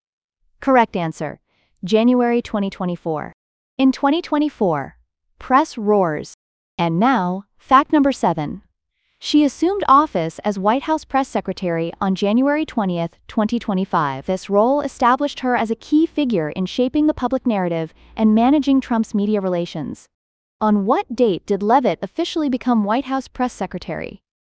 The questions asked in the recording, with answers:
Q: On what date did Leavitt officially become White House press secretary?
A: Correct answer, January 20, 2025.